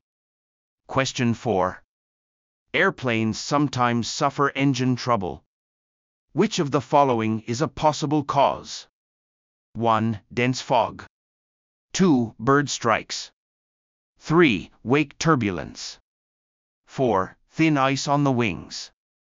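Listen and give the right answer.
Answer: 2: Bird strikes.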